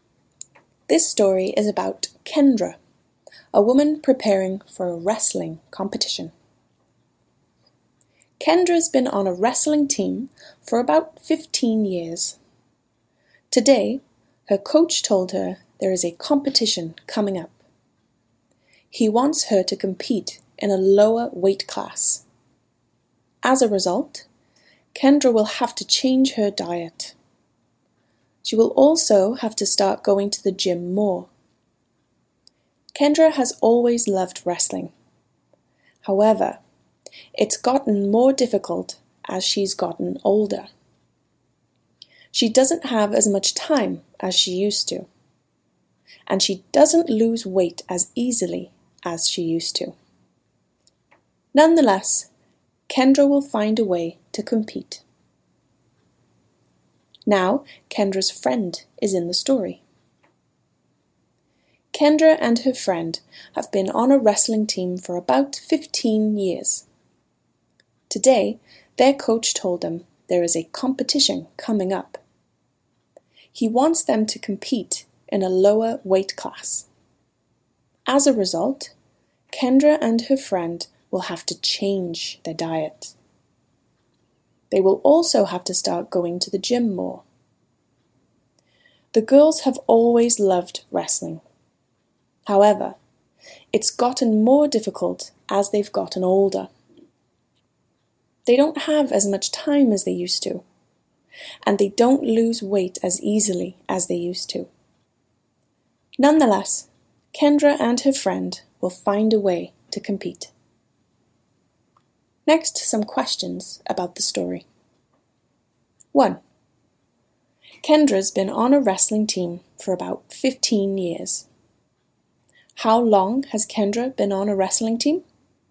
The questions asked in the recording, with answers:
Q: How long has Kendra been on a wrestling team?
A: Kendra's been on a wrestling team for about 15 years.